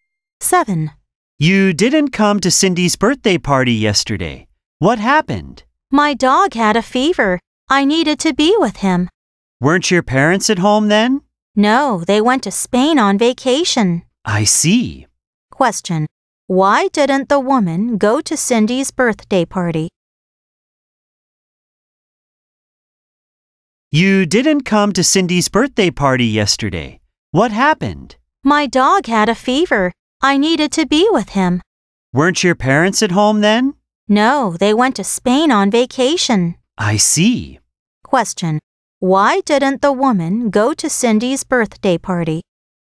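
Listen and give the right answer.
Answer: Her dog had a fever and she needed to be with him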